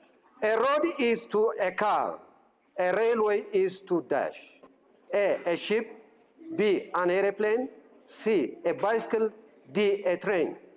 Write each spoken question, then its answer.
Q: A road is to a car. A railway is to dash.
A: D, a train.